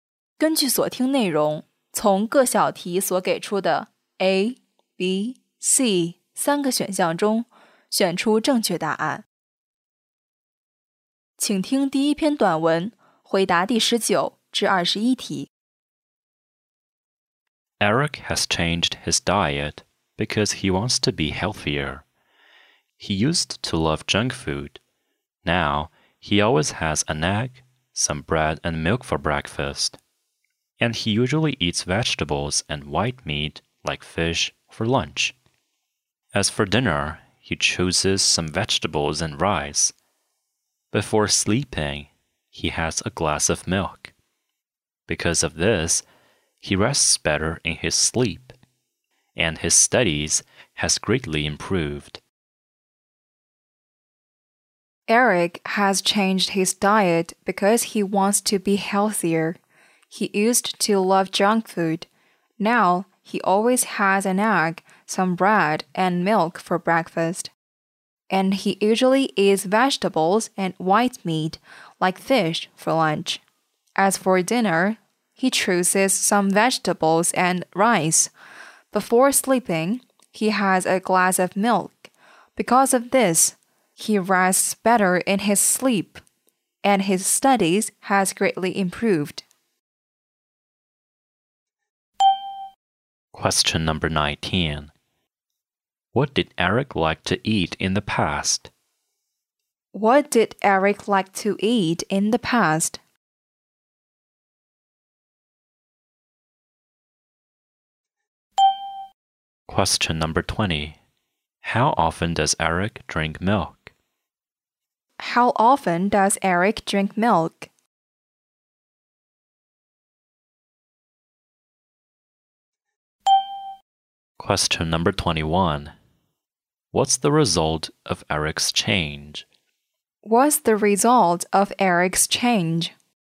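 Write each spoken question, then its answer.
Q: What did Eric like to eat in the past?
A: Junk food

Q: How often does Eric drink milk?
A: Twice a day

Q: What's the result of Eric's change?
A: He rests better and his studies have greatly improved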